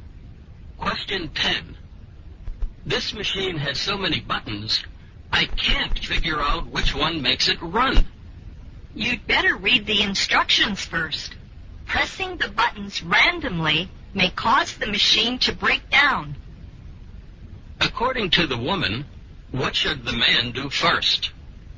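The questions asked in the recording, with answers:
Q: According to the woman, what should the man do first?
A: Read the instructions.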